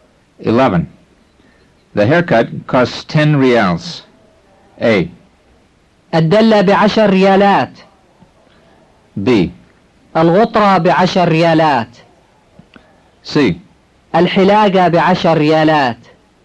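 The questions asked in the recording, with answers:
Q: The haircut costs 10 reals.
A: C: الحلاقة بعشر ريالات.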